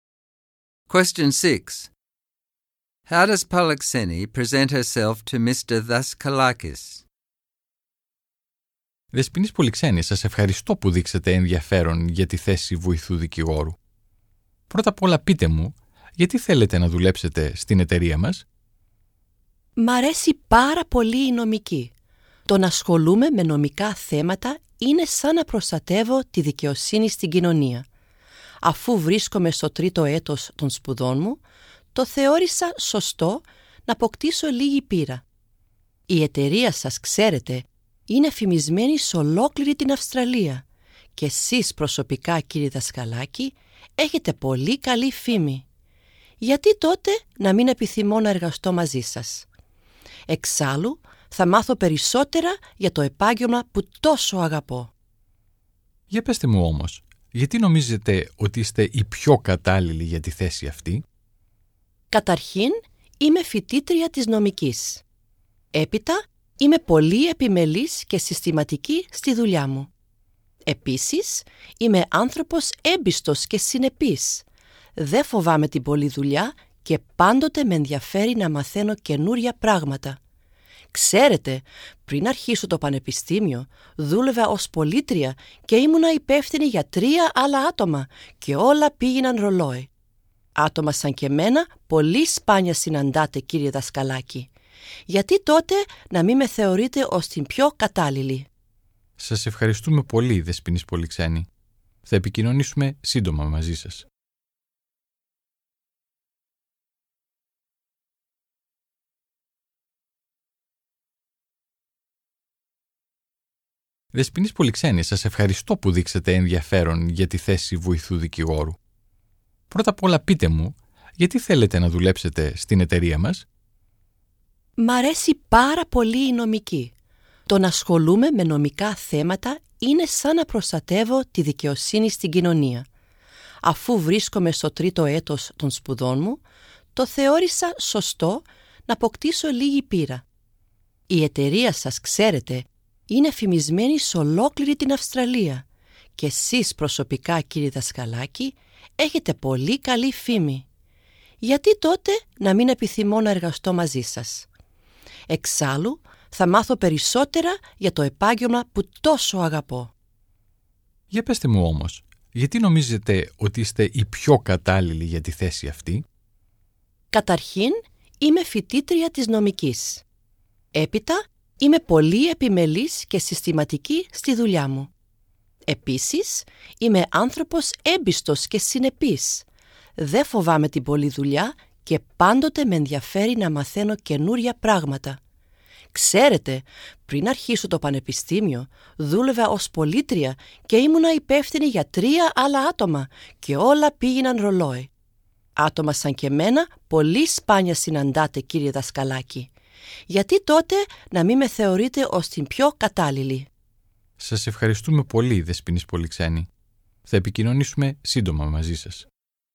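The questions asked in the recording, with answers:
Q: How does Polixeni present herself to Mr.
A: Very confidently, even boastfully. She flatters the firm and Mr Daskalakis, and says she loves law and is a law student. She calls herself diligent, systematic, trustworthy, consistent and hardworking, mentions her past experience supervising three people, and says people like her are rare.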